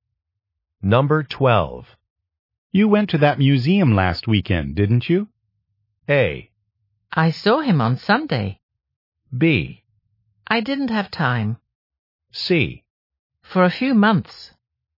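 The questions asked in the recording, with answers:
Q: You went to that museum last weekend, didn't you?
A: B: I didn't have time.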